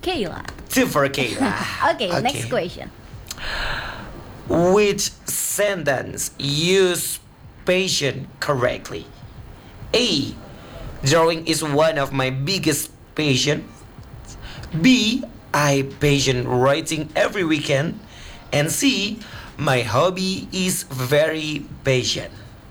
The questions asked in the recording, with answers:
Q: Which sentence use passion correctly?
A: It's A.